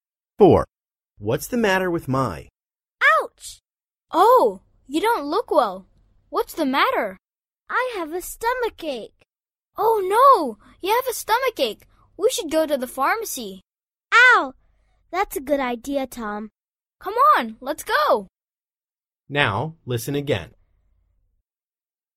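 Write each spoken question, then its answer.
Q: What's the matter with Mai?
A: She has a stomachache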